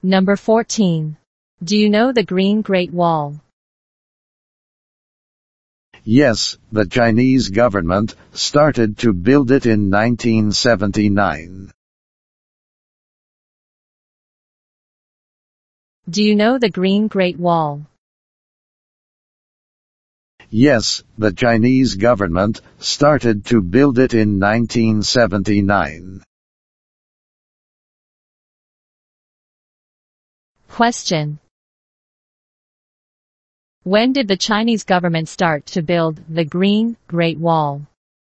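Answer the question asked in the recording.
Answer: In 1979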